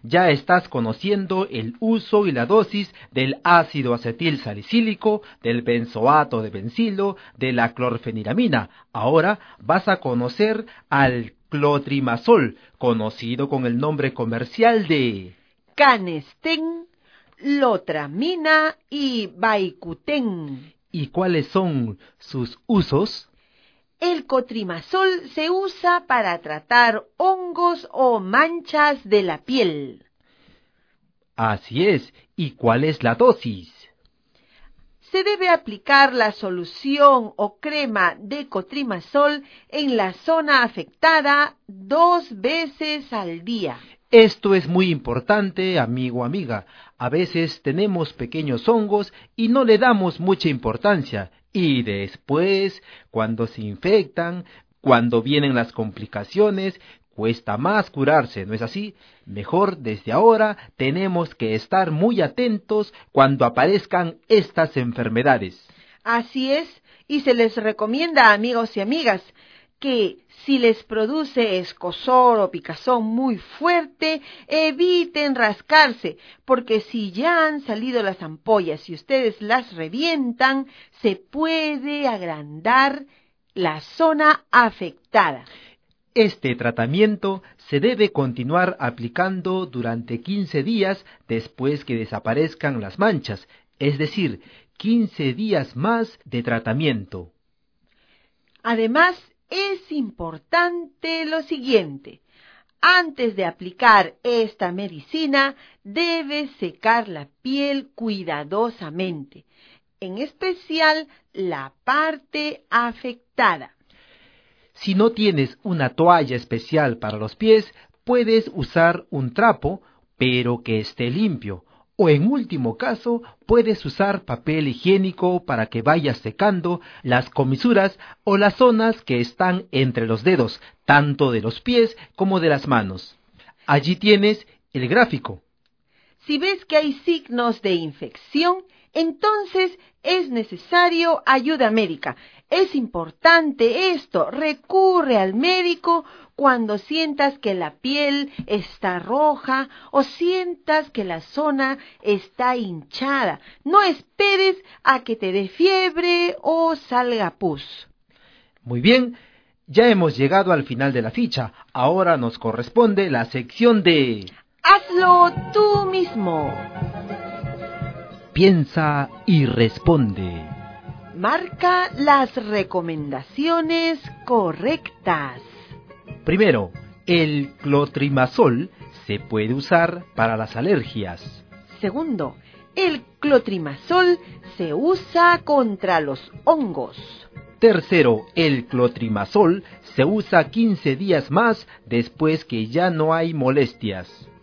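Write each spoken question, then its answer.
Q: Primero, el clotrimazol se puede usar para las alergias.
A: Incorrecta

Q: Segundo, el clotrimazol se usa contra los hongos.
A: Correcta

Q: Tercero, el clotrimazol se usa 15 días más después que ya no hay molestias.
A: Correcta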